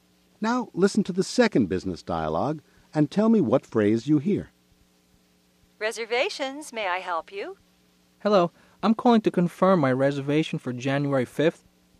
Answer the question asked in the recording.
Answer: Mr. Alioto said, I'm calling to confirm.